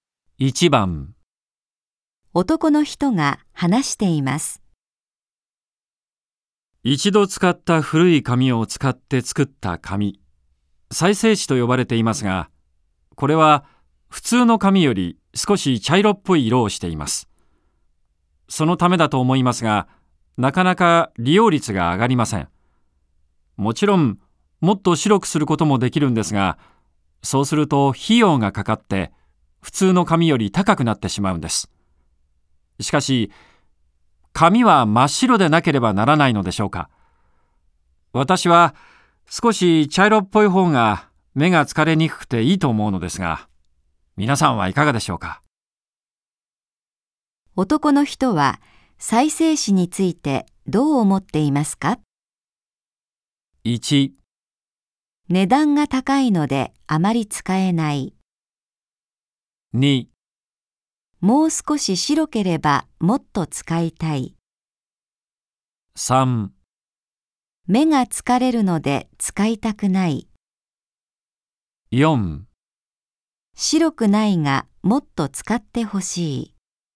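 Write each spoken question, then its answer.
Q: 男の人は再生紙についてどう思っていますか ?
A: 4: 白くないがもっと使ってほしい。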